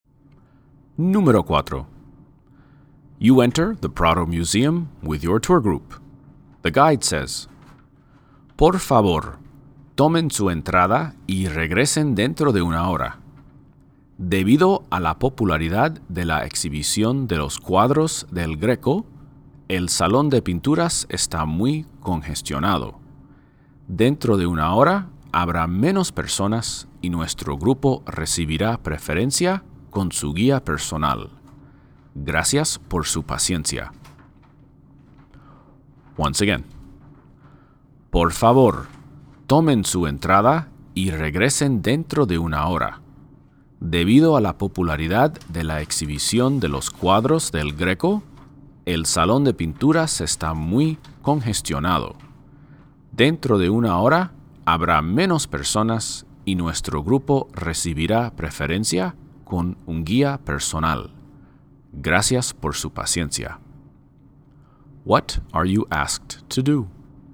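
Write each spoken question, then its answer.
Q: What are you asked to do?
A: Take your ticket and come back in an hour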